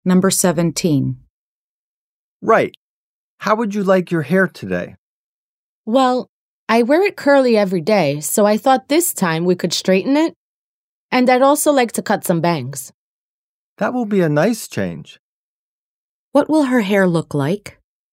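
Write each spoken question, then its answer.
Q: What will her hair look like?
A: Straight, with bangs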